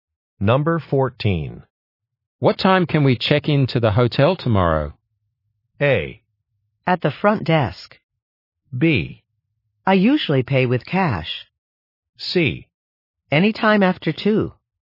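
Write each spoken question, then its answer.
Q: What time can we check into the hotel tomorrow?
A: C: Anytime after 2.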